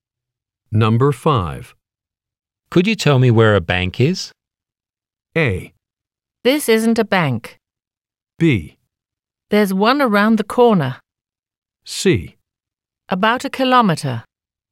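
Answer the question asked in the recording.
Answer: B: There's one around the corner.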